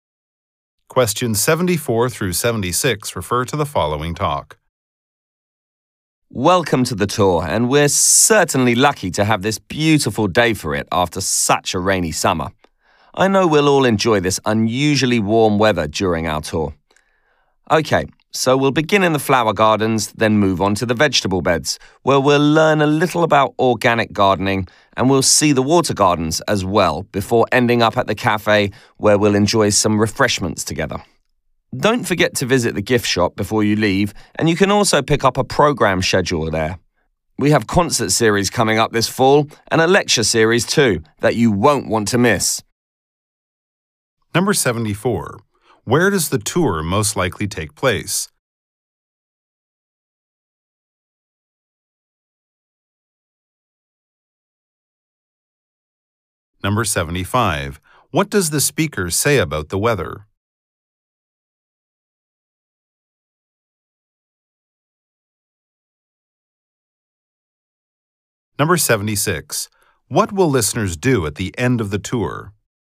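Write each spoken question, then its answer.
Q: Where does the tour most likely take place?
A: At a garden

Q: What does the speaker say about the weather?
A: It is unusually warm and beautiful after a rainy summer

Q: What will listeners do at the end of the tour?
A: Have refreshments at the cafe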